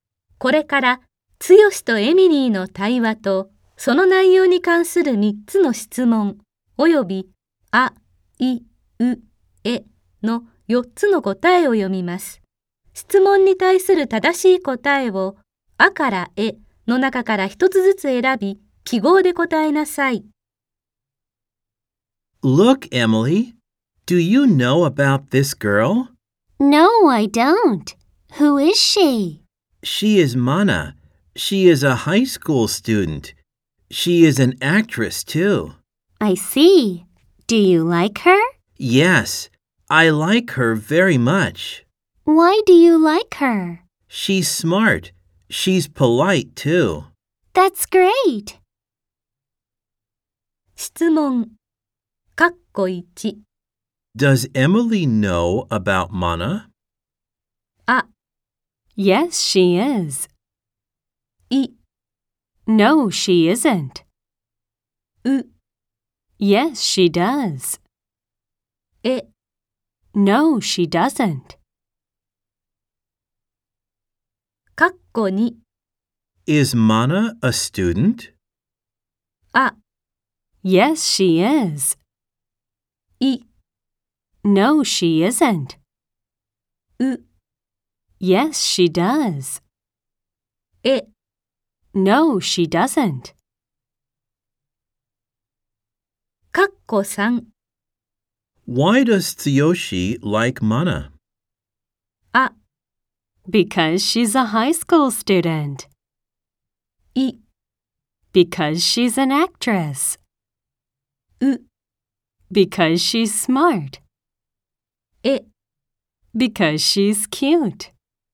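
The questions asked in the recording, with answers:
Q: Does Emily know about Mana?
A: え: No, she doesn't.

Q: Is Mana a student?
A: あ: Yes, she is.

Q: Why does Tsuyoshi like Mana?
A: う: Because she's smart.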